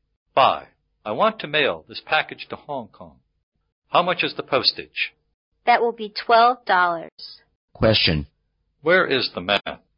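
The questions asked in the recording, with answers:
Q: Where is the man?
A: At a post office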